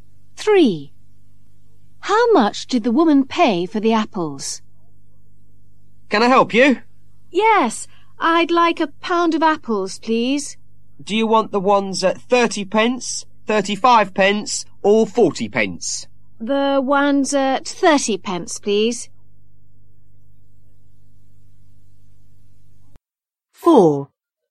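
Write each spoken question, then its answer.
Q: How much did the woman pay for the apples?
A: 30 pence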